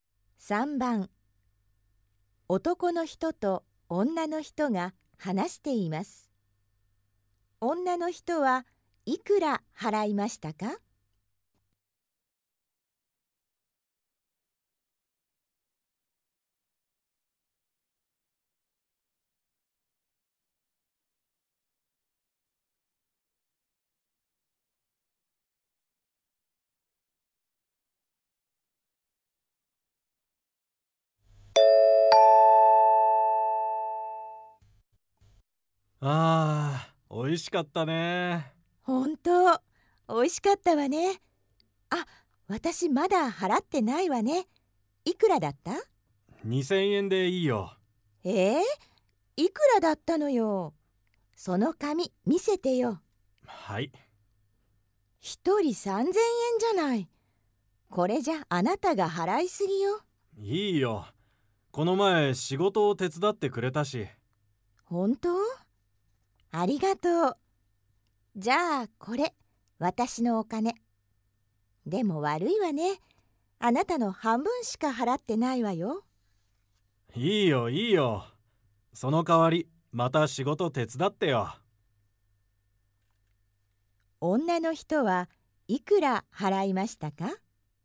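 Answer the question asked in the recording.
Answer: 2000円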